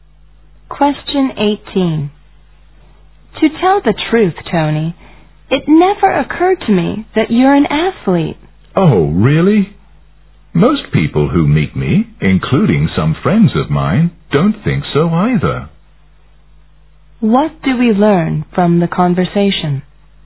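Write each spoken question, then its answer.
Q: What do we learn from the conversation?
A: Tony doesn't look like an athlete.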